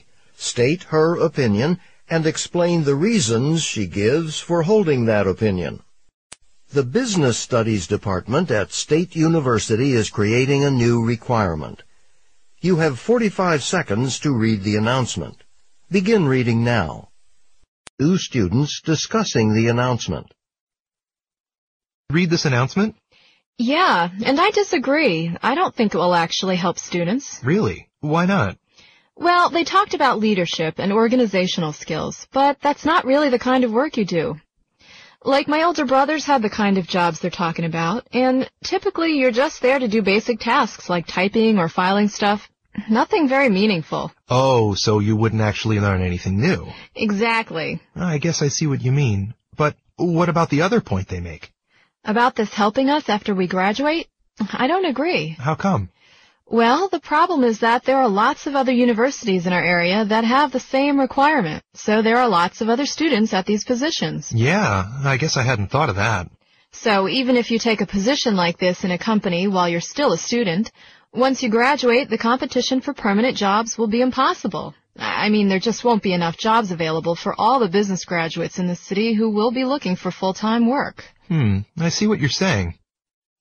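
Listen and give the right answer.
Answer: She disagrees with it: such jobs involve only basic tasks like typing or filing, so students learn nothing new, and it won't help after graduation because many students from other local universities have the same requirement, so there will be too much competition for full-time jobs.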